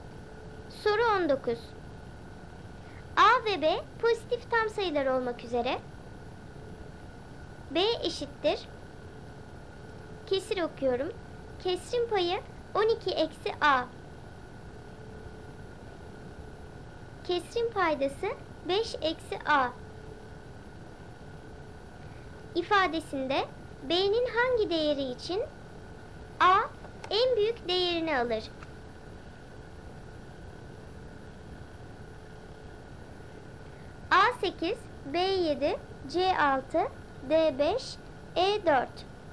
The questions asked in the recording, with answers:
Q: İfadesinde B'nin hangi değeri için A en büyük değerini alır?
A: Doğru cevap A 8.